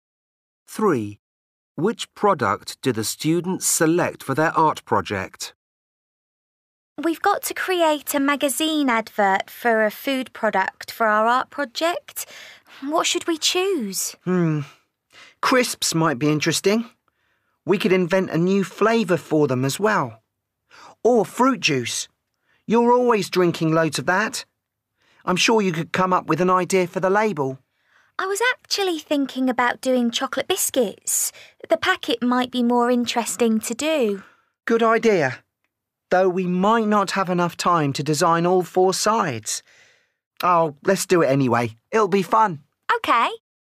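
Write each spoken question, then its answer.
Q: Which product do the students select for their art project?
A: chocolate biscuits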